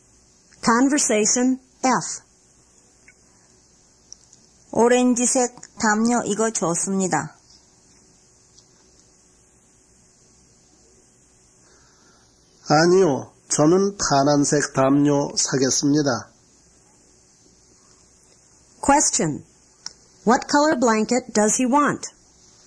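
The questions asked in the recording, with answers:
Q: What color blanket does he want?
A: Blue.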